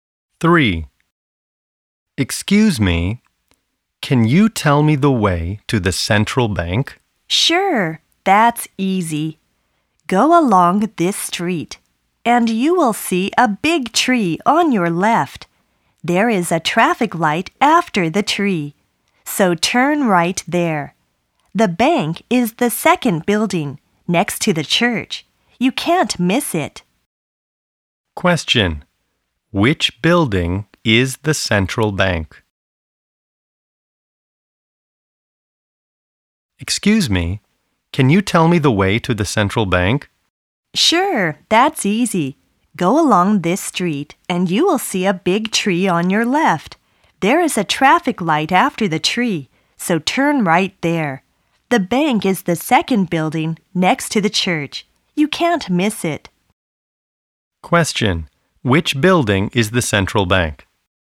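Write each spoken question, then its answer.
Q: Which building is the central bank?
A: The second building after the traffic light on the right, next to the church.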